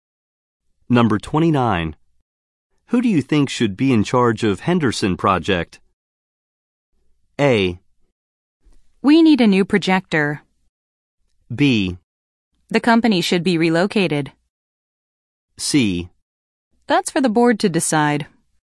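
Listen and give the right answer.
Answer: C: That's for the board to decide.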